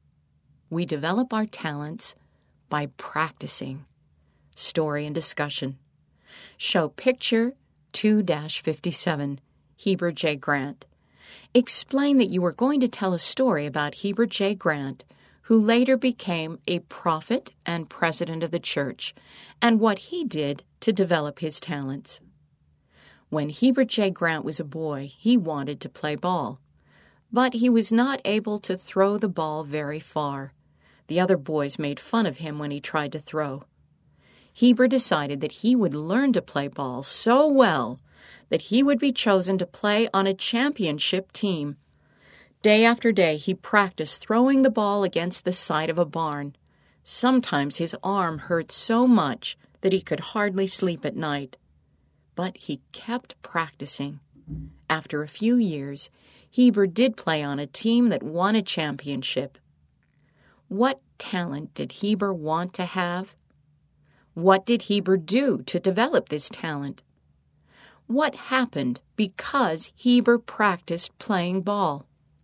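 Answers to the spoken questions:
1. Playing ball well
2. He practiced throwing the ball against the side of a barn day after day
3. He played on a team that won a championship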